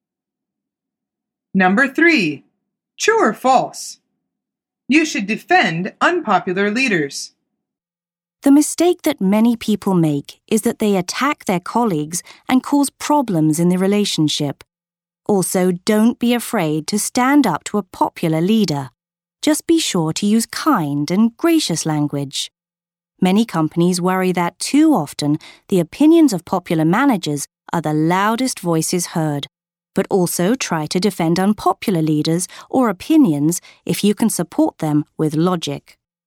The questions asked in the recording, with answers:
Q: True or false? You should defend unpopular leaders.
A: The answer is true. She says, try to defend unpopular leaders or opinions if you can support them with logic.